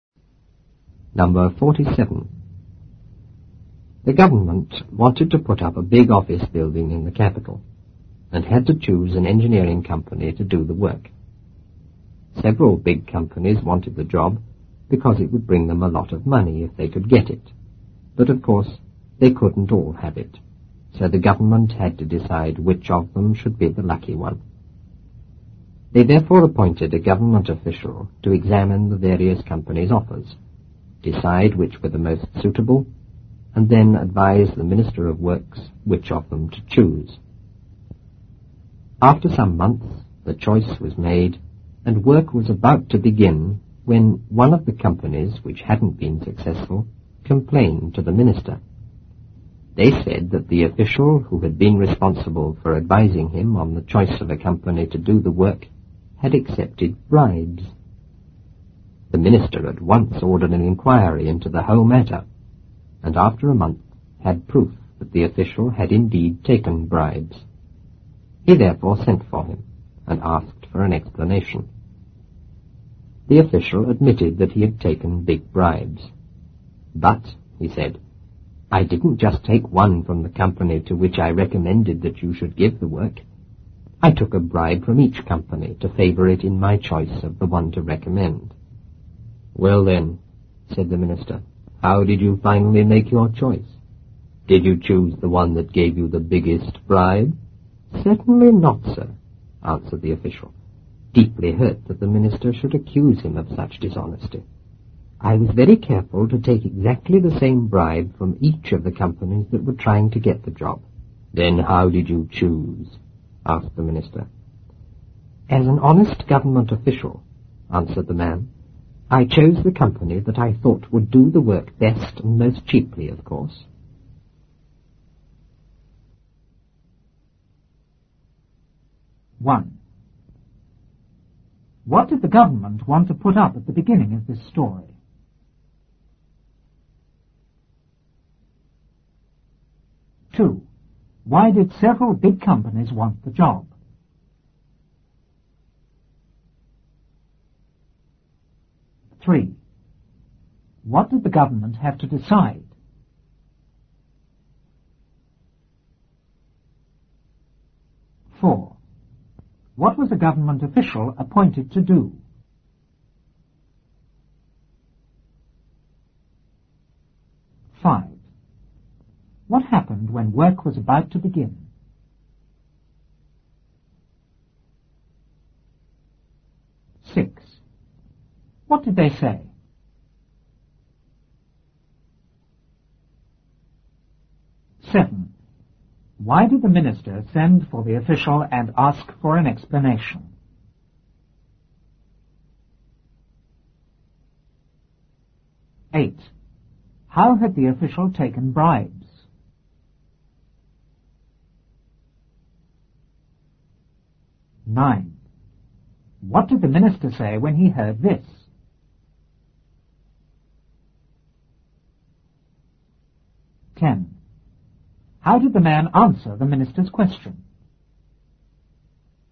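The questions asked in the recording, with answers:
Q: What did the government want to put up at the beginning of this story?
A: A big office building in the capital

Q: Why did several big companies want the job?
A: Because it would bring them a lot of money

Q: What did the government have to decide?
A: Which company should get the job

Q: What was a government official appointed to do?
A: Examine the companies' offers, decide which were most suitable, and advise the Minister of Works which to choose

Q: What happened when work was about to begin?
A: One of the unsuccessful companies complained to the minister

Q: What did they say?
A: That the official responsible for advising him had accepted bribes

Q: Why did the minister send for the official and ask for an explanation?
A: Because an inquiry proved the official had taken bribes

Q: How had the official taken bribes?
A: He took exactly the same bribe from each company trying to get the job

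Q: What did the minister say when he heard this?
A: He asked how he finally made his choice, and whether he chose the one that gave the biggest bribe

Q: How did the man answer the minister's question?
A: He chose the company he thought would do the work best and most cheaply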